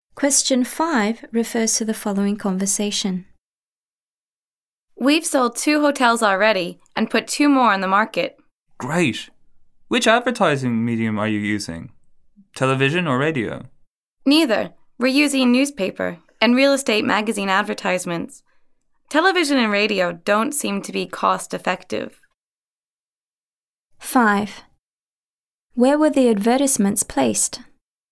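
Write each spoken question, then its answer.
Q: Where were the advertisements placed?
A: In newspapers and real estate magazines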